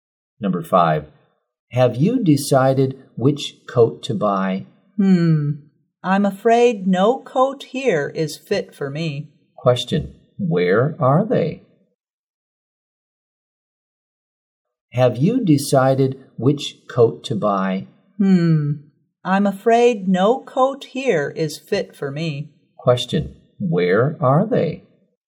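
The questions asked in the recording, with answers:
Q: Question, where are they?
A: In a clothes store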